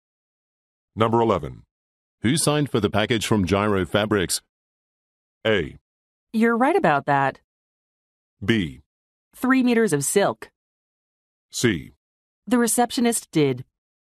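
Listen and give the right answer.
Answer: C: The receptionist did.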